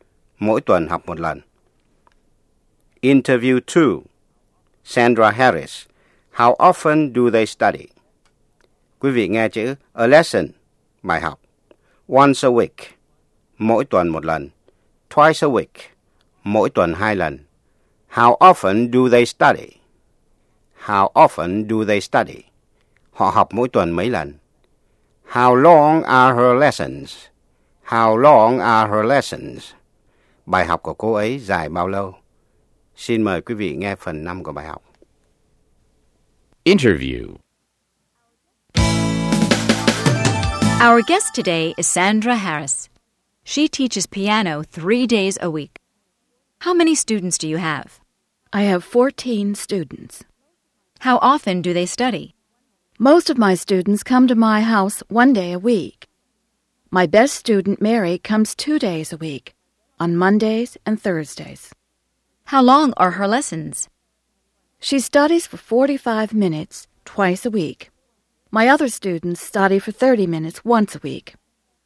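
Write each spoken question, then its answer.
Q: How often do they study?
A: Most students once a week; Mary twice a week

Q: How long are her lessons?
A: 45 minutes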